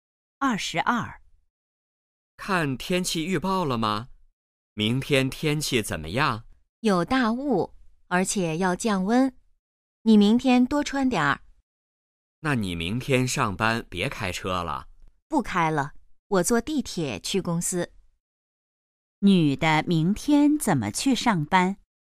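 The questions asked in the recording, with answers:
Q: 女的明天怎么去上班?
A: 坐地铁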